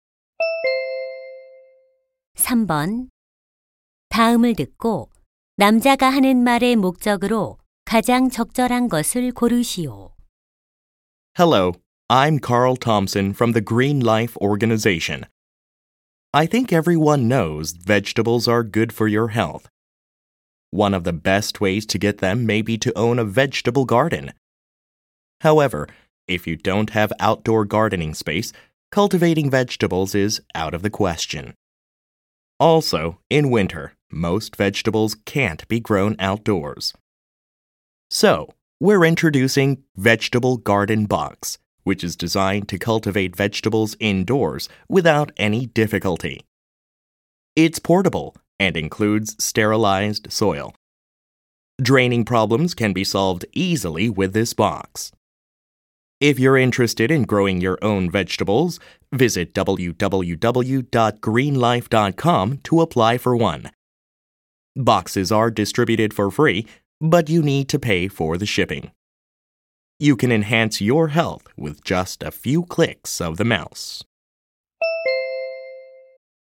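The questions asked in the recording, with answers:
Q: 다음을 듣고 남자가 하는 말의 목적으로 가장 적절한 것을 고르시오.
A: 실내용 채소 재배 상자(Vegetable Garden Box) 신청을 홍보하려고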